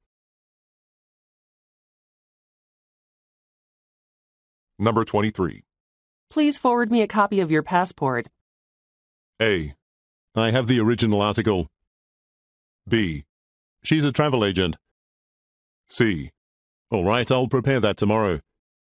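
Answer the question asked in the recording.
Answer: C: All right, I'll prepare that tomorrow.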